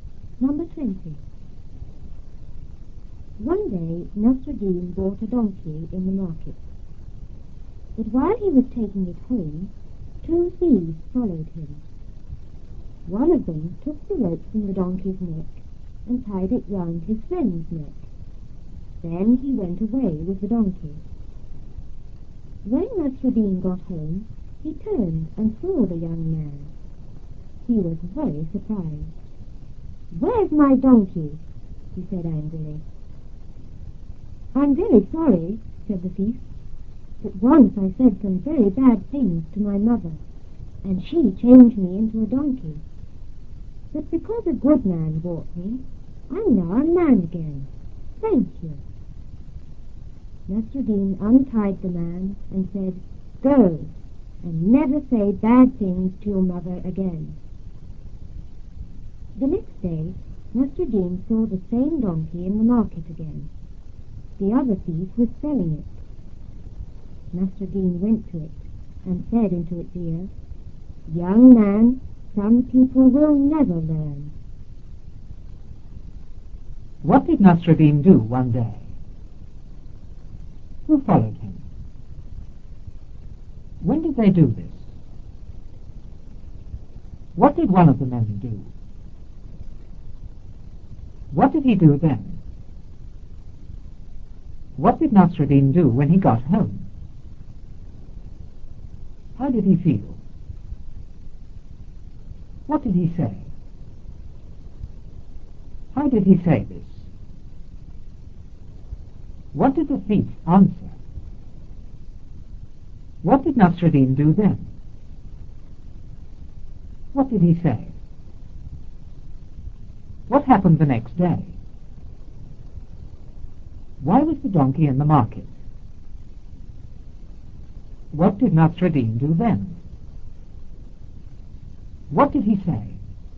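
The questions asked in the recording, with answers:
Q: What did Nasruddin do one day?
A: He bought a donkey in the market.

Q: Who followed him?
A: Two thieves.

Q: When did they do this?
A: While he was taking the donkey home.

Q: What did one of the men do?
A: He took the rope from the donkey's neck and tied it round his friend's neck.

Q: What did he do then?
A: He went away with the donkey.

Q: What did Nasruddin do when he got home?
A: He turned and saw the young man.

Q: How did he feel?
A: Very surprised.

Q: What did he say?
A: "Where's my donkey?"

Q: How did he say this?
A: Angrily.

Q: What did the thief answer?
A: That his mother had changed him into a donkey for saying bad things, and he became a man again because a good man bought him.

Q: What did Nasruddin do then?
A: He untied the man.

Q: What did he say?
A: "Go, and never say bad things to your mother again."

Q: What happened the next day?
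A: Nasruddin saw the same donkey in the market again.

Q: Why was the donkey in the market?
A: The other thief was selling it.

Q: What did Nasruddin do then?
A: He went to the donkey and spoke into its ear.

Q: What did he say?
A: "Young man, some people will never learn."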